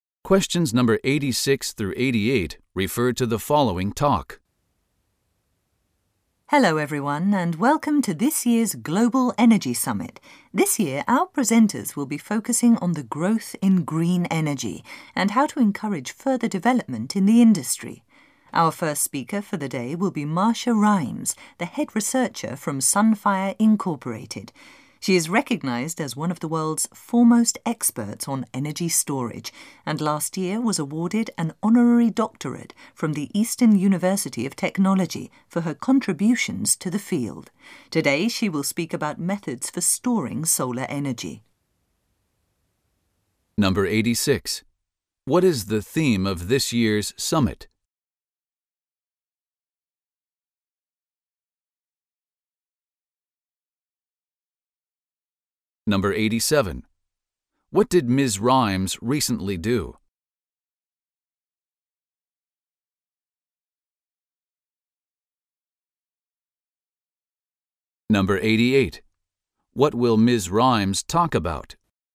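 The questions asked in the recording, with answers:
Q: What is the theme of this year's summit?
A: The growth in green energy and how to encourage further development

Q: What did Ms. Rimes recently do?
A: She received an honorary doctorate from the Eastern University of Technology

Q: What will Ms. Rimes talk about?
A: Methods for storing solar energy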